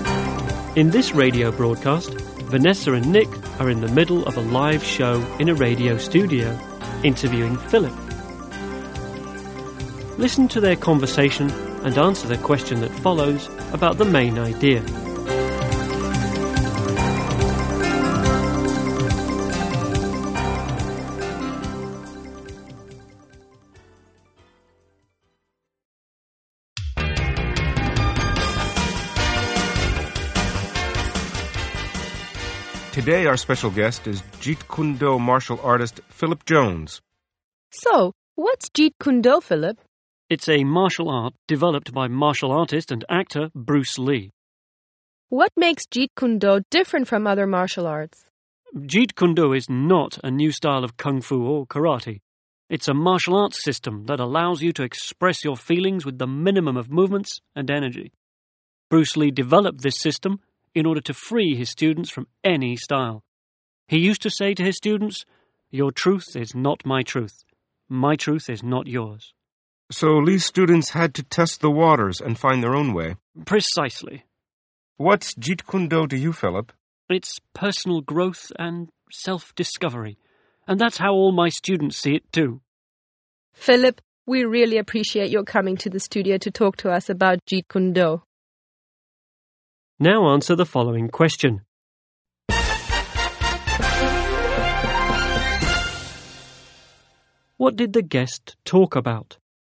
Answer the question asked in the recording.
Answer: He talked about the martial art of Jeet Kune Do.